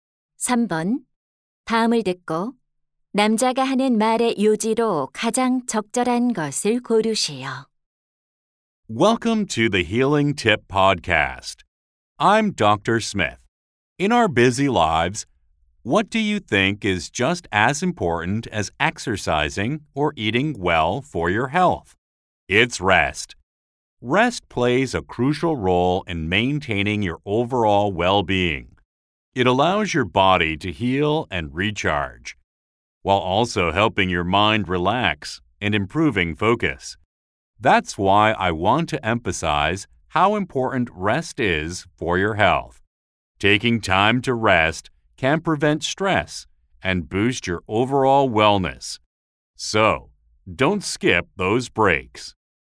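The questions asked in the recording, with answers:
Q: 다음을 듣고 남자가 하는 말의 요지로 가장 적절한 것을 고르세요.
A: 휴식은 건강에 중요하다.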